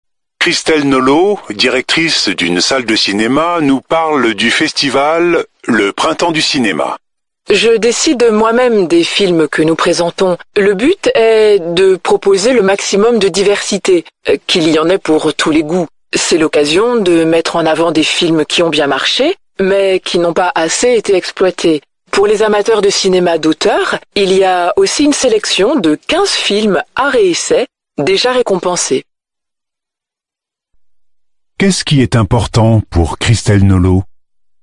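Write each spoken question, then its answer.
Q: Qu'est-ce qui est important pour Christelle Nolot ?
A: Proposer le maximum de diversité, qu'il y en ait pour tous les goûts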